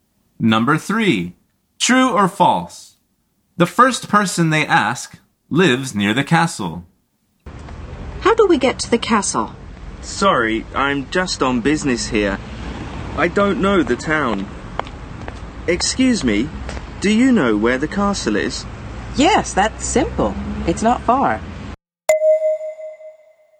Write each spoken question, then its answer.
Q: The first person they ask lives near the castle.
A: The answer is false.